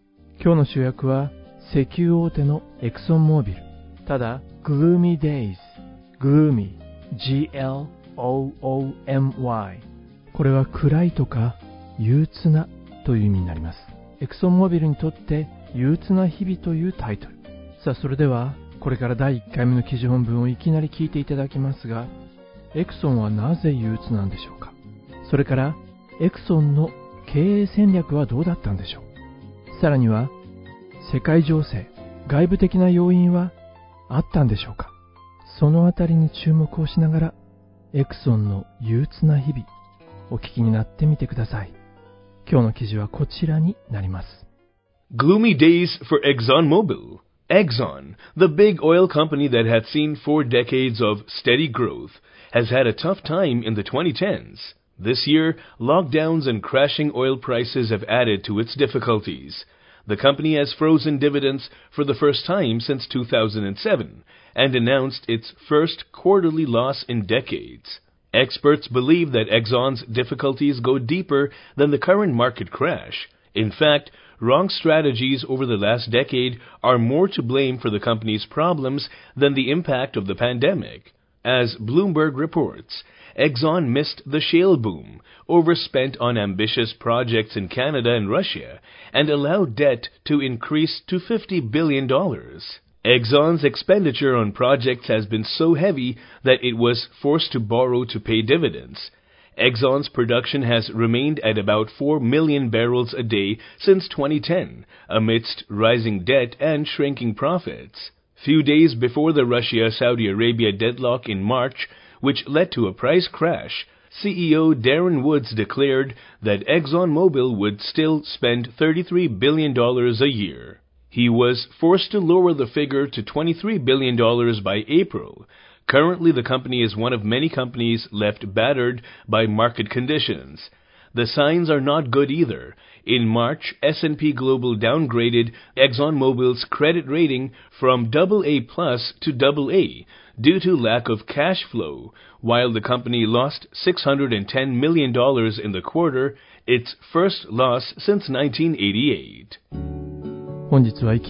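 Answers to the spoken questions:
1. 過去10年の経営戦略の誤りに加え、ロックダウンと石油価格の暴落で、配当凍結と数十年ぶりの四半期赤字に追い込まれたから
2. 誤っていた。シェールブームを逃し、カナダとロシアの野心的なプロジェクトに過剰投資し、負債を500億ドルまで膨らませた
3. あった。パンデミック(ロックダウン)と、ロシアとサウジアラビアの行き詰まりによる石油価格の暴落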